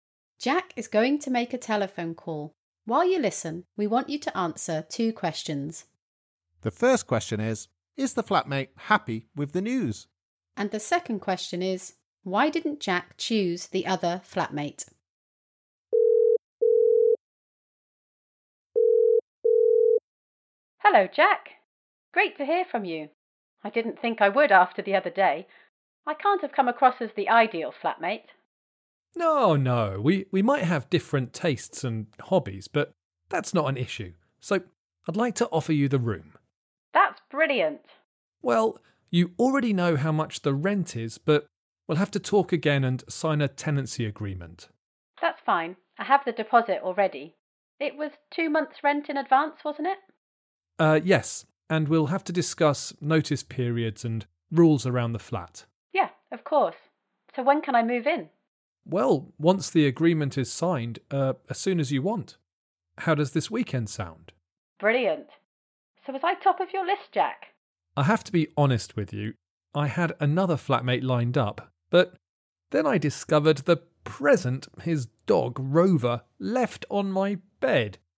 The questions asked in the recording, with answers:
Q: The first question is the flatmate happy with the news?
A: She was very happy. She was surprised because she thought she hadn't made a good impression in the interview.

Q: And the second question is, why didn't Jack choose the other flatmate?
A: Well, I was already a bit unsure about having pets in my flat.